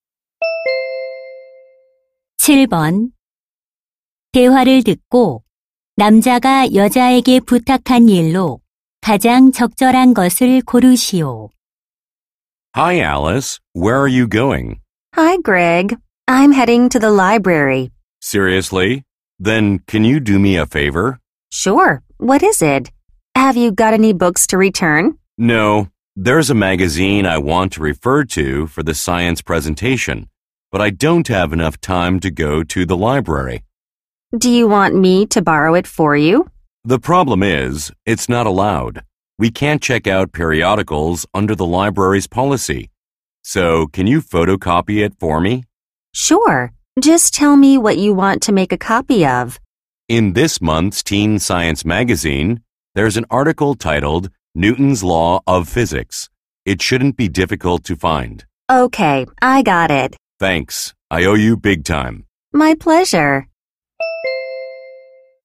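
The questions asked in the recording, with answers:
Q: 7번대화를듣고남자가여자에게부탁한일로가장적절한것을고르시오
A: 잡지 기사 복사하기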